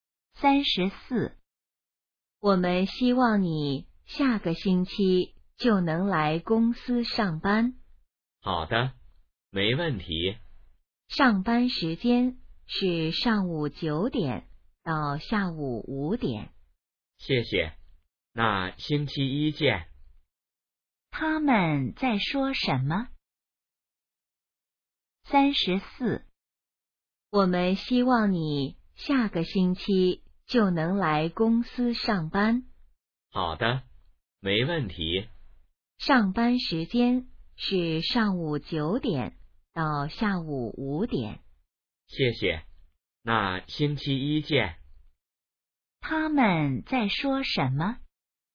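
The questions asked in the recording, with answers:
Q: 他们在说什么?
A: 去公司上班的事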